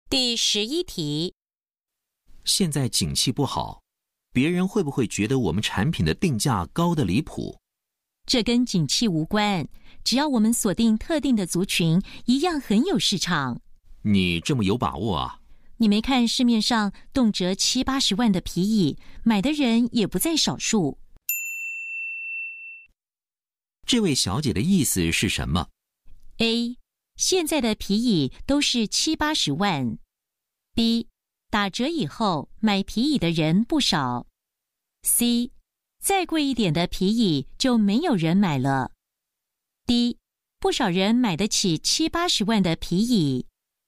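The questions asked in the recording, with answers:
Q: 这位小姐的意思是什么?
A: D: 不少人买得起七八十万的皮椅。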